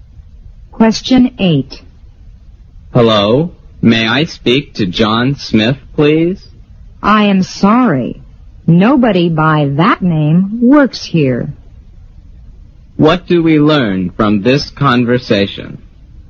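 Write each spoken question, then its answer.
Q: What do we learn from this conversation?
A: The caller has the wrong number; no John Smith works there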